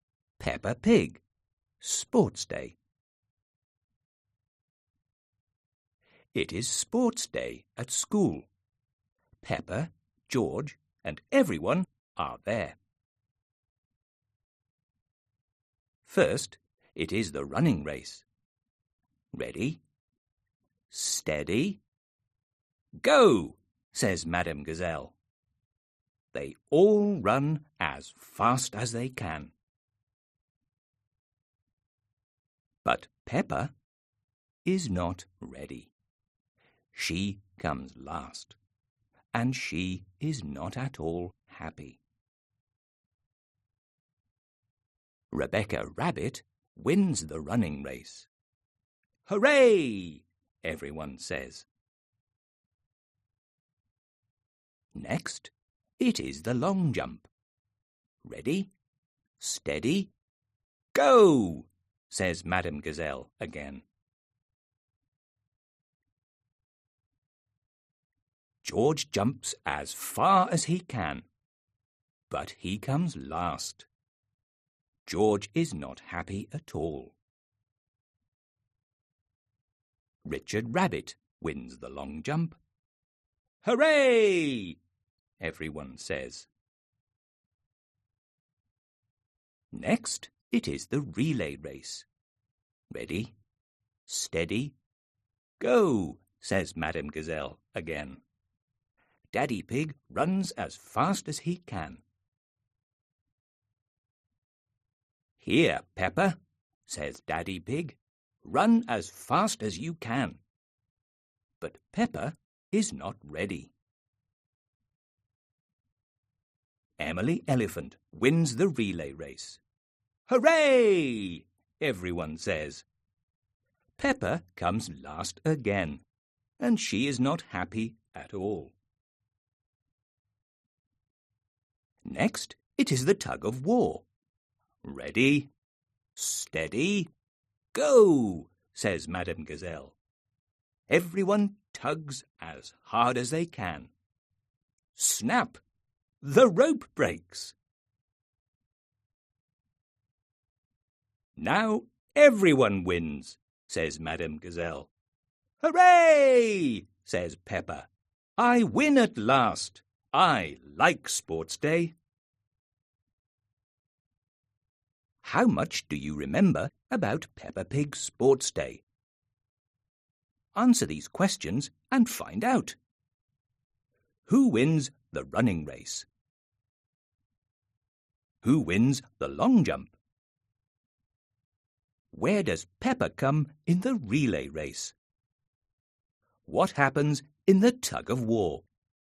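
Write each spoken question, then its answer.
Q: Who wins the running race?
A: Rebecca Rabbit

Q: Who wins the long jump?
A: Richard Rabbit

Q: Where does Peppa come in the relay race?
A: Last

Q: What happens in the tug of war?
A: The rope breaks and everyone wins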